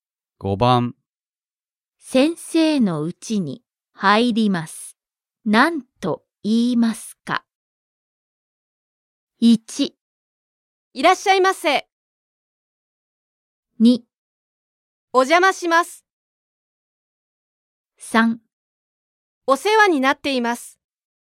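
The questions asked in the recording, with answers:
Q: 先生のうちに入ります。何と言いますか?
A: 2: お邪魔します。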